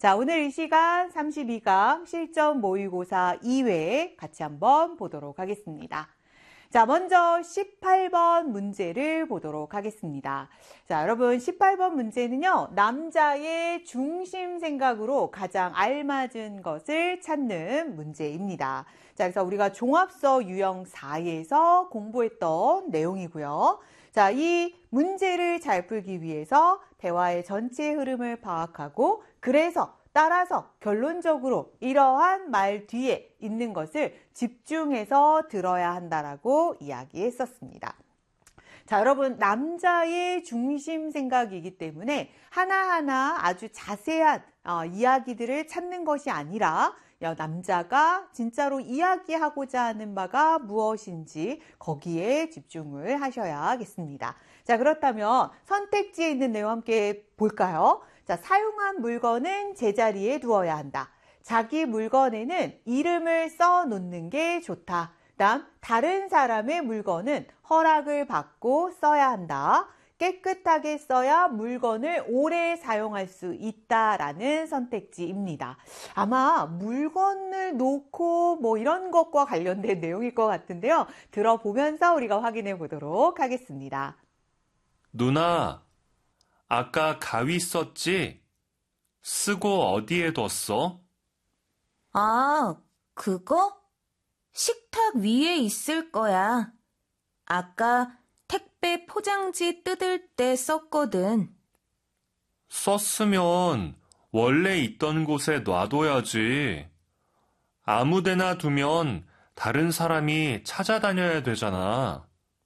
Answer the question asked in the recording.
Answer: 정답은 1번이 되겠습니다.